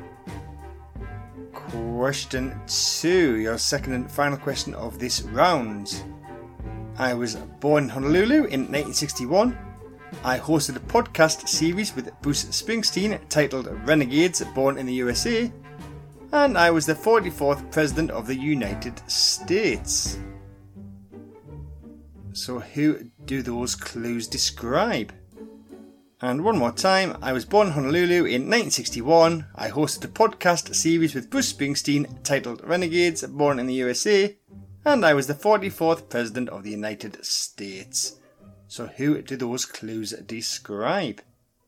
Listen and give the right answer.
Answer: And that is Barack Obama.